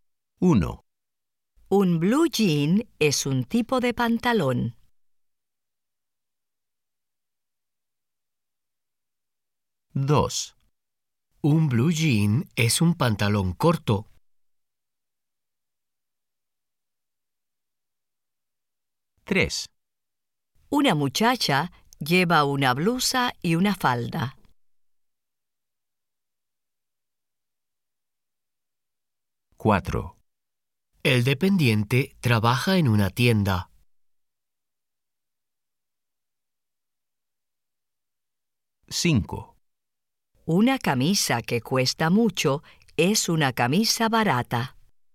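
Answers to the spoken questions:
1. Sí
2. No
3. Sí
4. Sí
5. No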